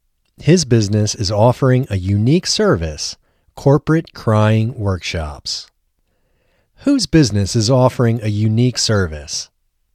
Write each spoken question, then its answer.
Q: Whose business is offering a unique service?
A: Tedai's business is offering a unique service.